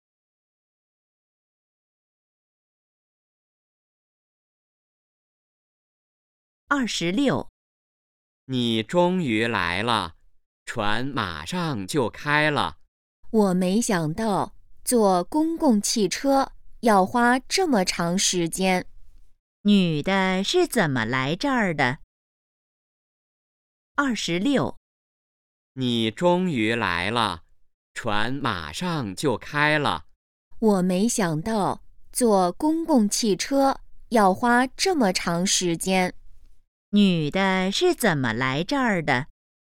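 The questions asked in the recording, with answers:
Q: 女的是怎么来这儿的?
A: 坐公共汽车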